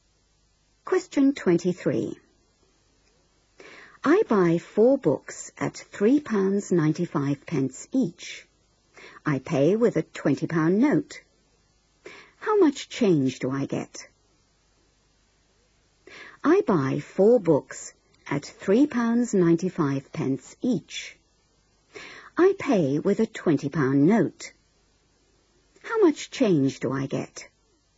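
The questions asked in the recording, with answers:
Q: I pay with a £20 note. How much change do I get?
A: £4.20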